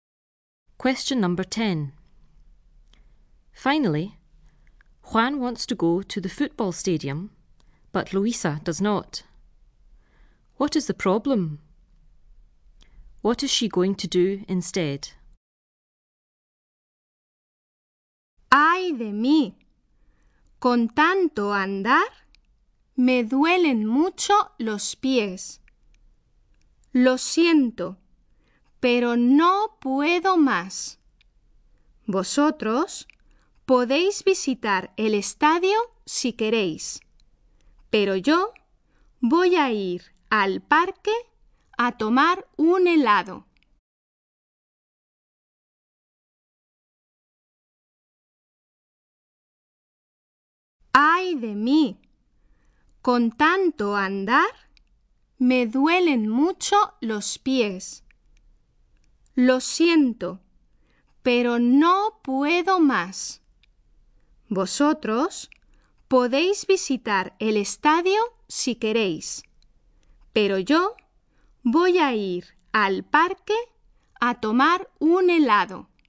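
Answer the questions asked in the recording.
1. Her feet hurt a lot from all the walking
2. Go to the park to have an ice cream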